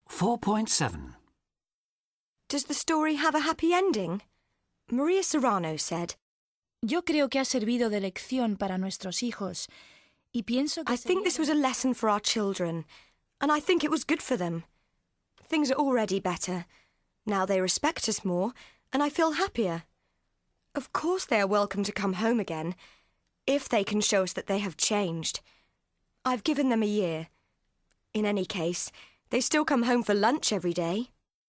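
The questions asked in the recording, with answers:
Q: Does the story have a happy ending?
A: Yes, things are better; the children respect the parents more and the mother feels happier.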